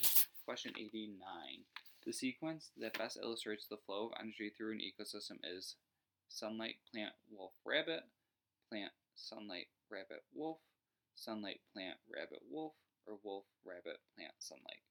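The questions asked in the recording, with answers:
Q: The sequence that best illustrates the flow of energy through an ecosystem is sunlight, plant, wolf, rabbit, plant, sunlight, rabbit, wolf, sunlight, plant, rabbit, wolf, or wolf, rabbit, plant, sunlight.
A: 3: sunlight, plant, rabbit, wolf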